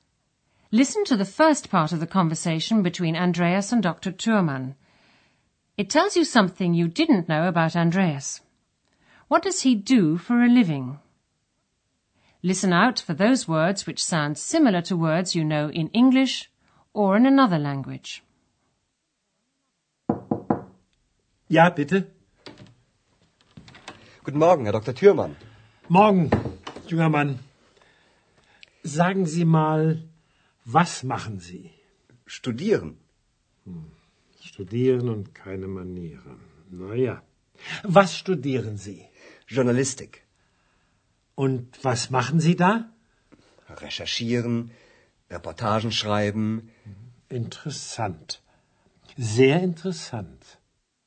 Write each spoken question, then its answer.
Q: What does he do for a living?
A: Andreas is studying journalism.